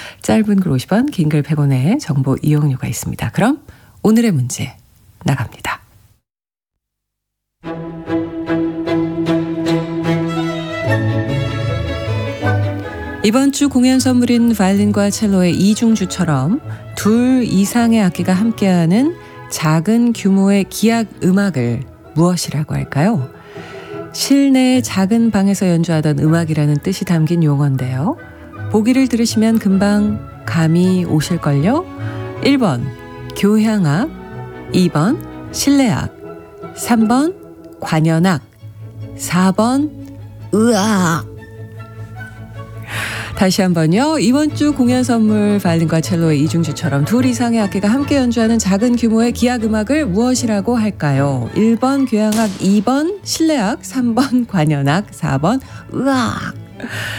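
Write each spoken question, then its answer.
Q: 이번 주 공연 선물인 바이올린과 첼로의 이중주처럼 둘 이상의 악기가 함께하는 작은 규모의 기악 음악을 무엇이라고 할까요?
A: 2번: 실내악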